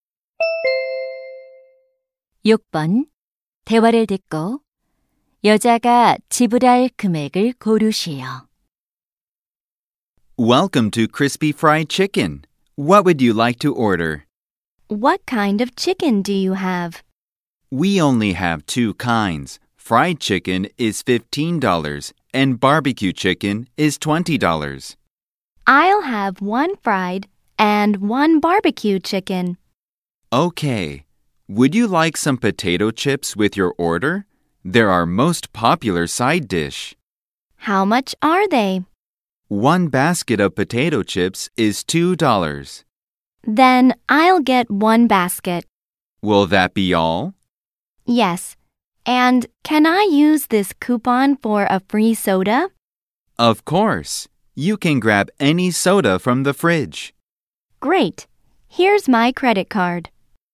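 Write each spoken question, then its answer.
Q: 대화를 듣고 여자가 지불할 금액을 고르시오.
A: 37달러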